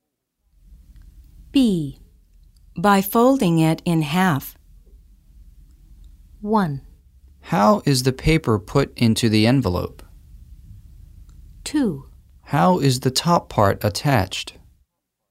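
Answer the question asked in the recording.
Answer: 1: How is the paper put into the envelope?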